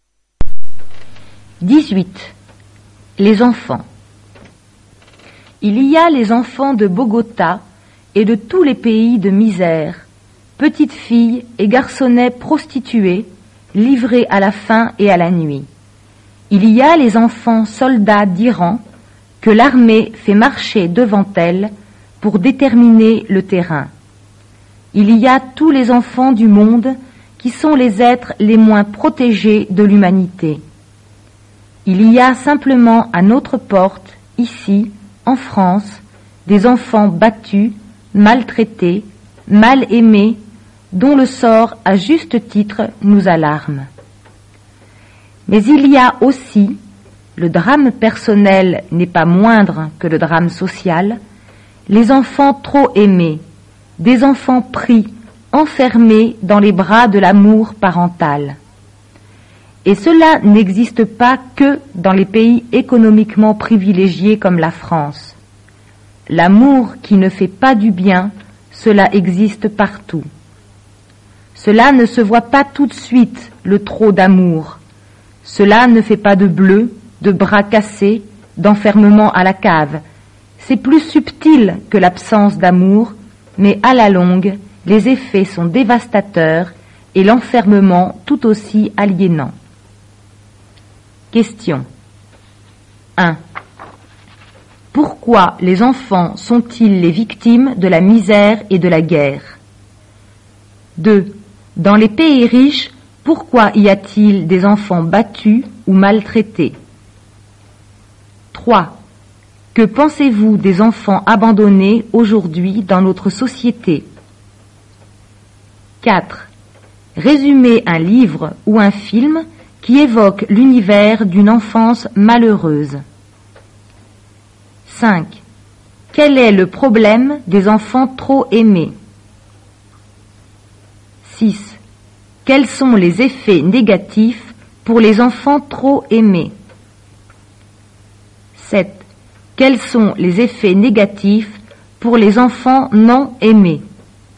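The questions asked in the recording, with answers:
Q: Quel est le problème des enfants trop aimés?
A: Ils sont enfermés dans les bras de l'amour parental, un amour qui ne fait pas du bien

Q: Quels sont les effets négatifs pour les enfants trop aimés?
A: À la longue, des effets dévastateurs et un enfermement aussi aliénant que l'absence d'amour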